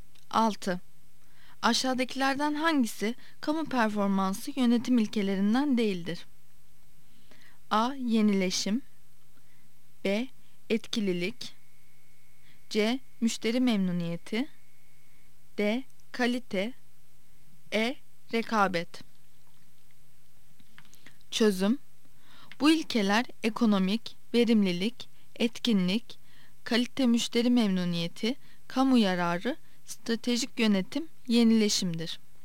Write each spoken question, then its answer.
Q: Aşağıdakilerden hangisi kamu performansı yönetim ilkelerinden değildir?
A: Yanıt E'dir. E. Rekabet.